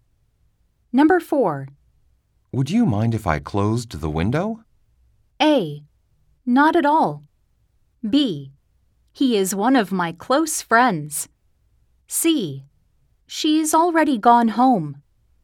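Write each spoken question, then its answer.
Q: Would you mind if I closed the window?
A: A: Not at all.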